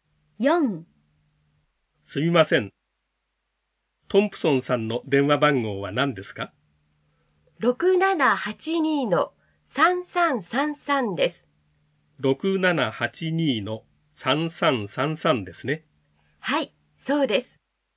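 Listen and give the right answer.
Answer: 6782-3333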